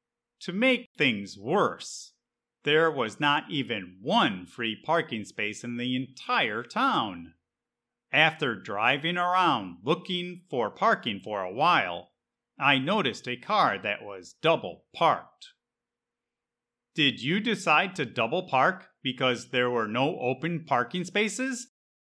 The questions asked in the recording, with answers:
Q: Did you decide to double park because there were no open parking spaces?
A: No, I did not double park, but I did notice a car that was double parked.